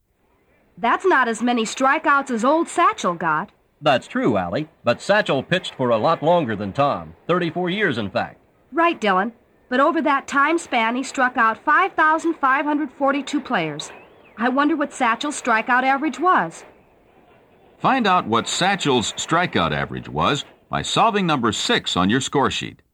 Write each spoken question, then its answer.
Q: I wonder what Satchel's strikeout average was.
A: You should have found that Satchel averaged 163 strikeouts per season.